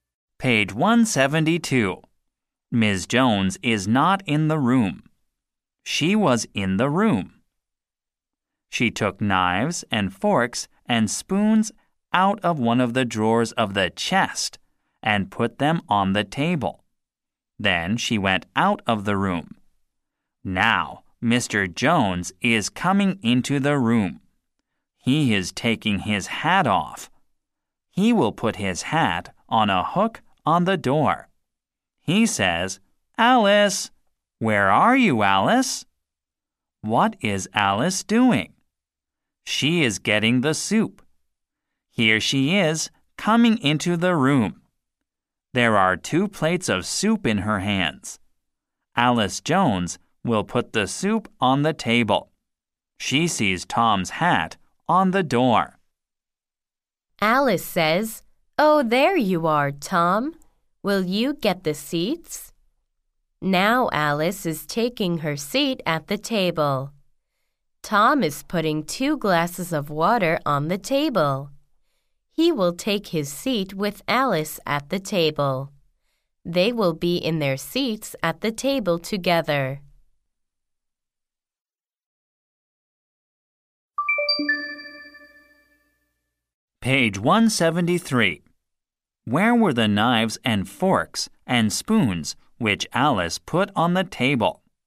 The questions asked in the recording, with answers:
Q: Where were the knives and forks and spoons which Alice put on the table?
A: They were in a drawer of the chest.